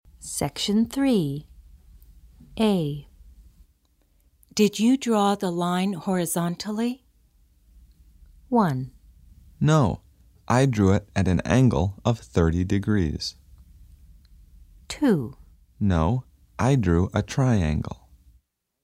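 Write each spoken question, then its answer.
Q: Did you draw the line horizontally?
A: 1: No, I drew it at an angle of 30 degrees.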